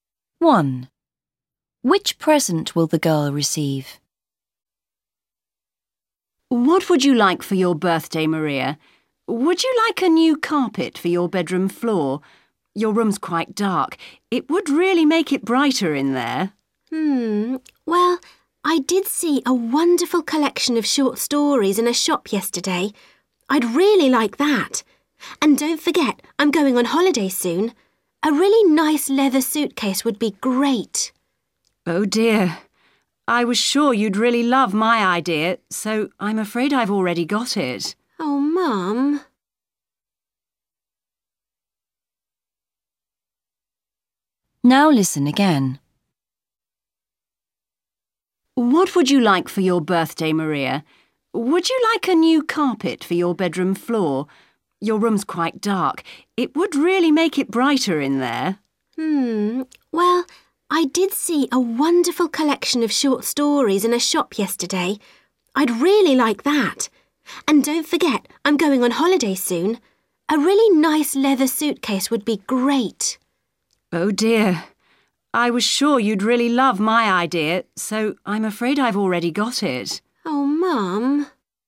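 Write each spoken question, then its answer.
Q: Which present will the girl receive?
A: A carpet for her bedroom floor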